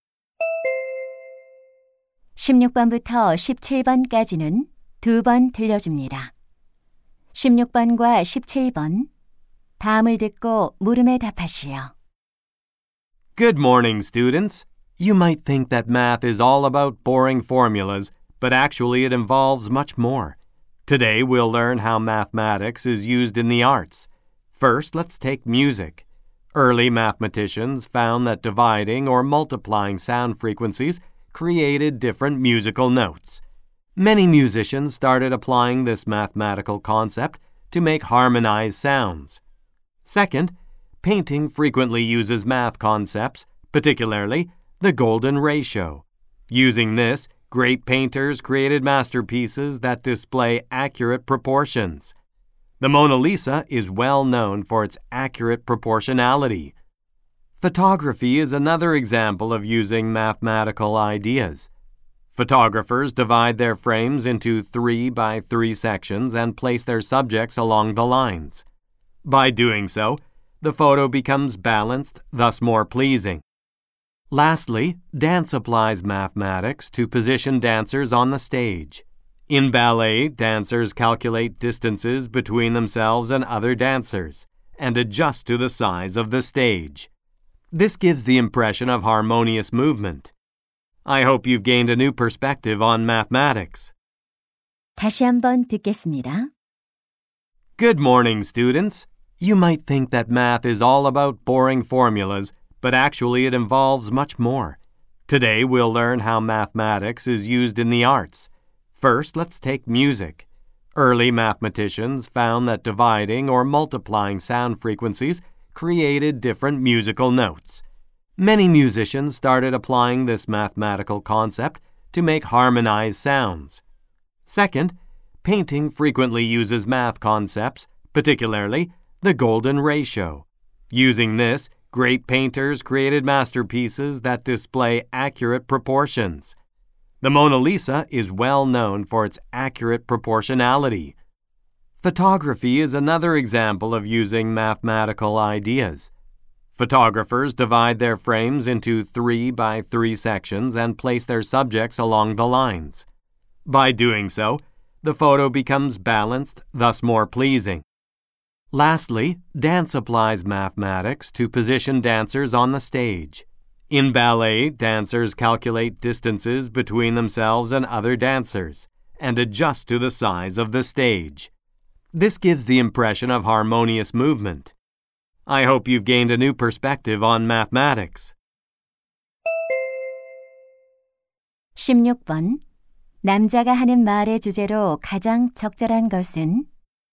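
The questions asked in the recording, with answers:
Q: 남자가 하는 말의 주제로 가장 적절한 것은?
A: 예술에 수학이 활용되는 방식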